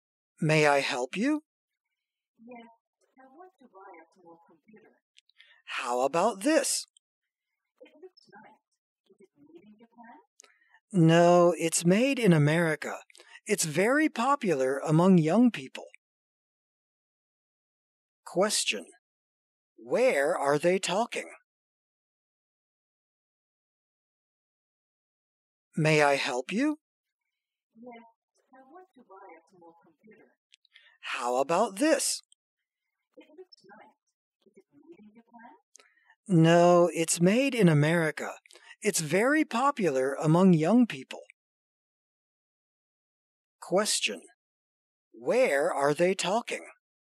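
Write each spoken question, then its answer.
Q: Where are they talking?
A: At a store (computer shop)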